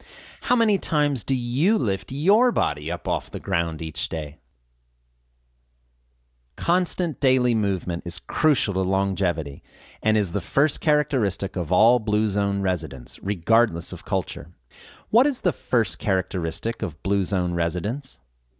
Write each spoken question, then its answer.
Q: What is the first characteristic of Blue Zone residents?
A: Constant daily movement is the first characteristic.